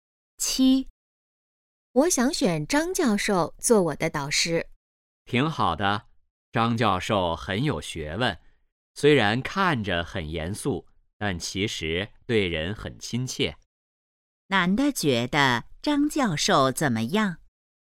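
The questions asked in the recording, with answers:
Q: 男的觉得张教授怎么样?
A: 很有学问,对人很亲切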